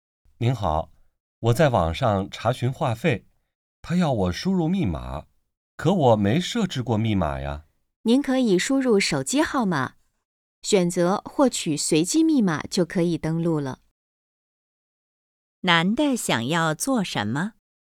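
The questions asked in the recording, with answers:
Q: 男的想要做什么?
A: 在网上查询话费(登录)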